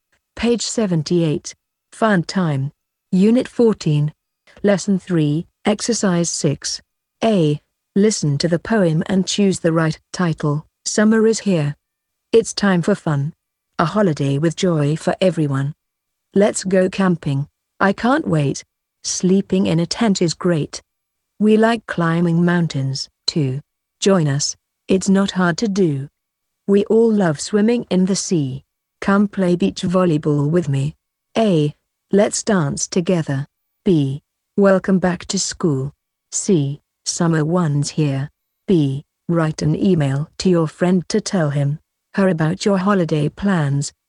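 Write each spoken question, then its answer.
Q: Listen to the poem and choose the right title.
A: C: Summer one's here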